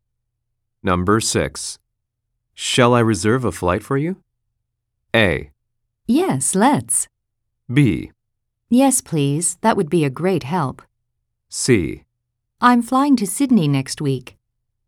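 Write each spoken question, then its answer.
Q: Shall I reserve a flight for you?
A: B: Yes, please. That would be a great help.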